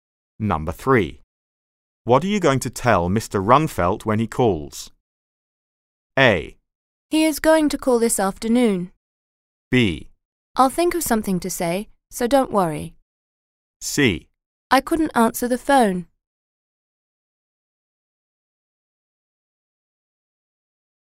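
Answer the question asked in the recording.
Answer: B: I'll think of something to say, so don't worry.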